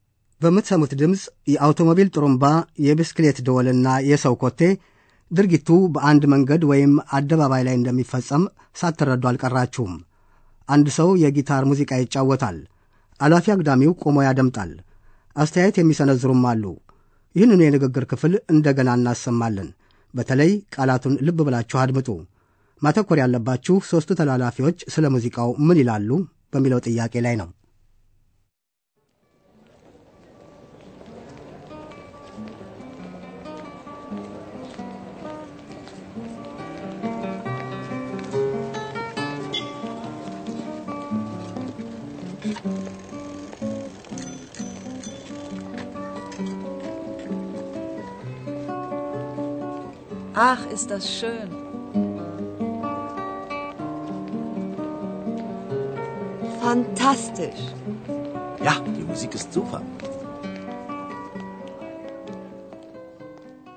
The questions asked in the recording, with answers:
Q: ሦስቱ ተላላፊዎች ስለ ሙዚቃው ምን ይላሉ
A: ሦስቱም በሙዚቃው ተደስተዋል።